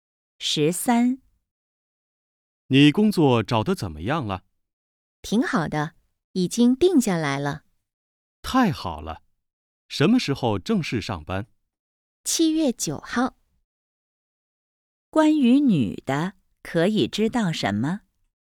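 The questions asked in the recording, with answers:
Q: 关于女的,可以知道什么?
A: 工作已经定下来了,7月9号正式上班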